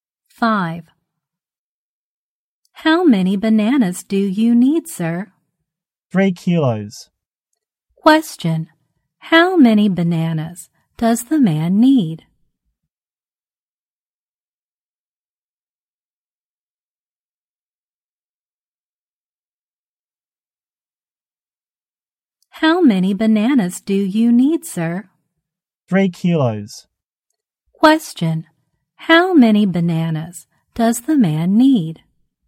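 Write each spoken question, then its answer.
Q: how many bananas does the man need?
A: 3 kilos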